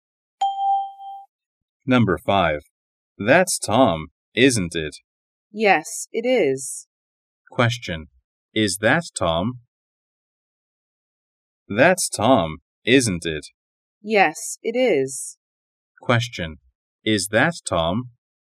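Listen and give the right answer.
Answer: Yes, it is.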